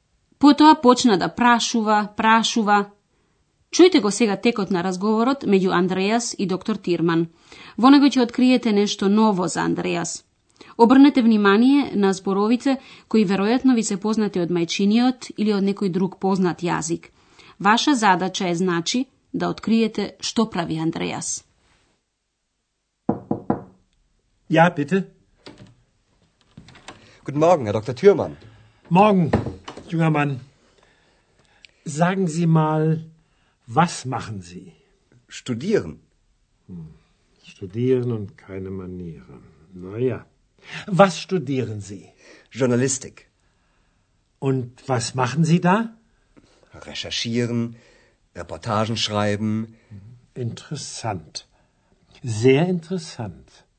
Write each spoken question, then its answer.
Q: Ваша задача е значи да откриете што прави Андреас.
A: Андреас студира новинарство.